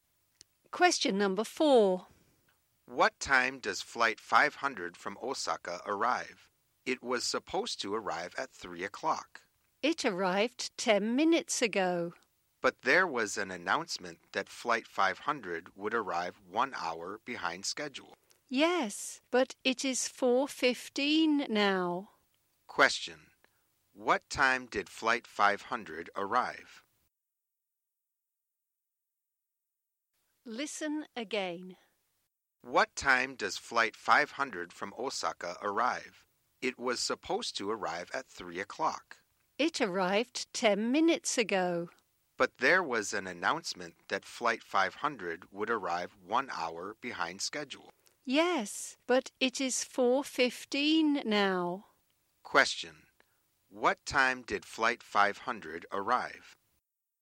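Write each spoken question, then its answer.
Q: What time did flight 500 arrive?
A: At 4:05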